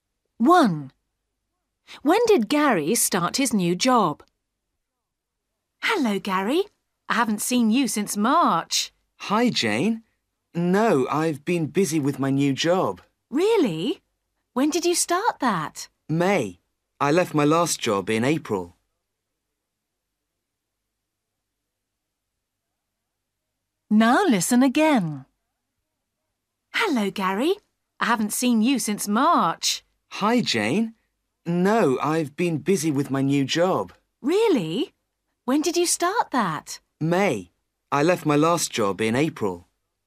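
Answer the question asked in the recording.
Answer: In May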